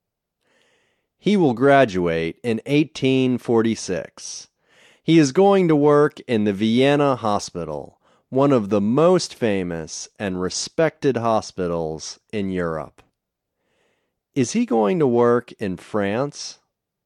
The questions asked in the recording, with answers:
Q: Is he going to work in France?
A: No, he isn't going to work in France.